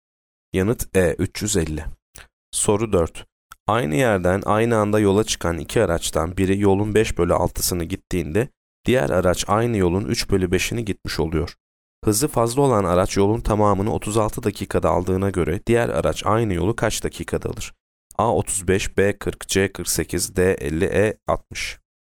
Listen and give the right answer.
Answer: Yanıt D 50.